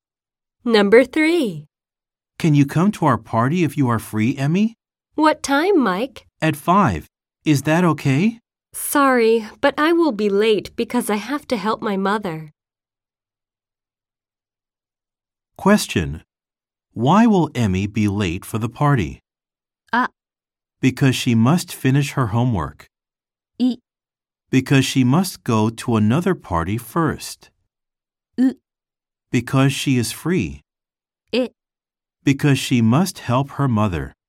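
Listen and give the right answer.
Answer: え: Because she must help her mother.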